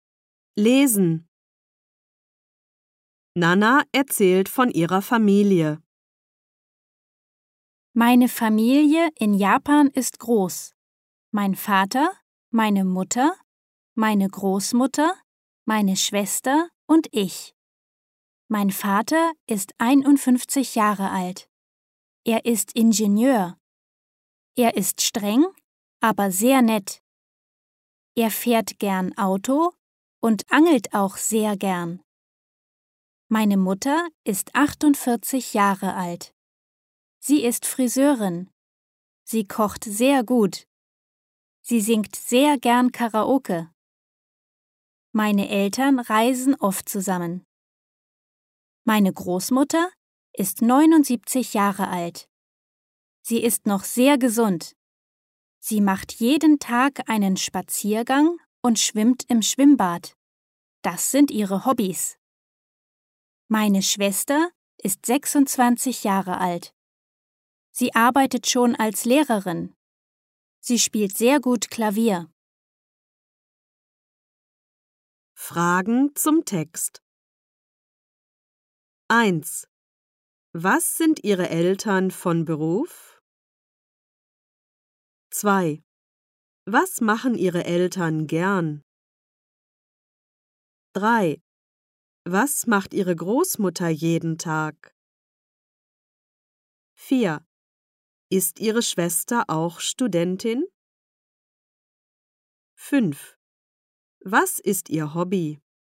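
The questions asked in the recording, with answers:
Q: Was sind Ihre Eltern von Beruf?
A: Der Vater ist Ingenieur, die Mutter ist Friseurin.

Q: Was machen Ihre Eltern gern?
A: Der Vater fährt gern Auto und angelt gern, die Mutter singt gern Karaoke; zusammen reisen sie oft.

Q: Was macht Ihre Großmutter jeden Tag?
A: Sie macht einen Spaziergang und schwimmt im Schwimmbad.

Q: Ist Ihre Schwester auch Studentin?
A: Nein, sie arbeitet schon als Lehrerin.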